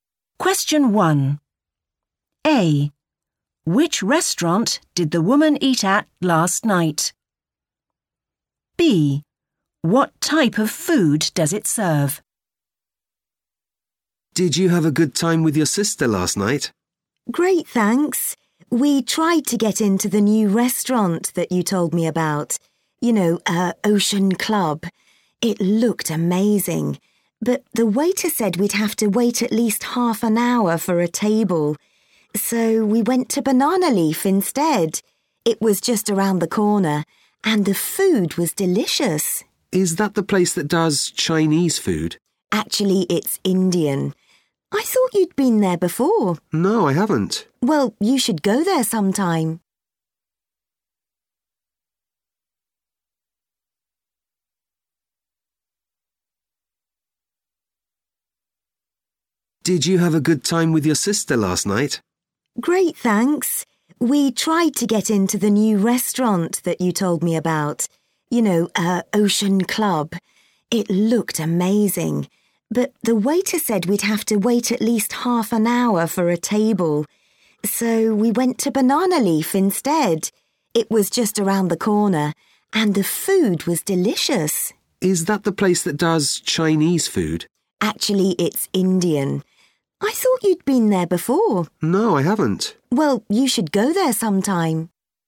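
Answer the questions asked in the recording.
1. Banana Leaf
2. Indian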